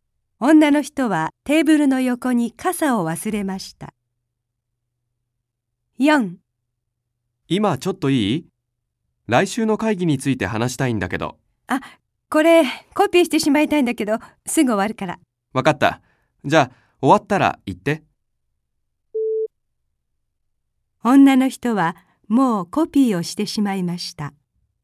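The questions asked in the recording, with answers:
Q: 女の人はもうコピーをしてしまいました。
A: 正しくない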